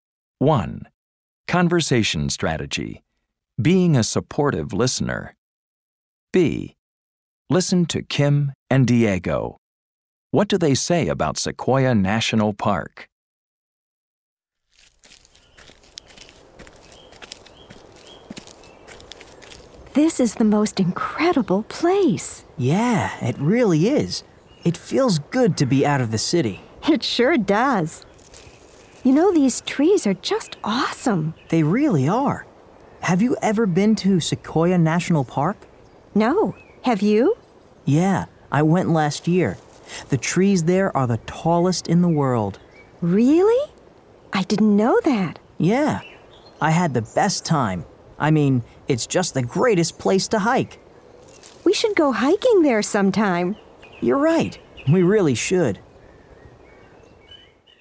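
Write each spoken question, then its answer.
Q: What do they say about Sequoia National Park?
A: Its trees are the tallest in the world, it's the greatest place to hike, and they should go hiking there sometime.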